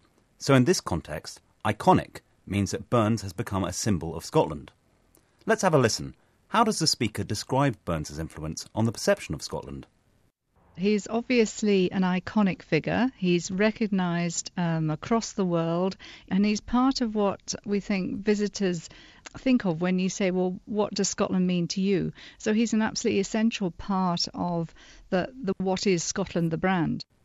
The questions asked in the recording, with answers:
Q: How does the speaker describe Burns' influence on the perception of Scotland?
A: So here she's saying that Robert Burns has become an essential part of Scotland's image overseas.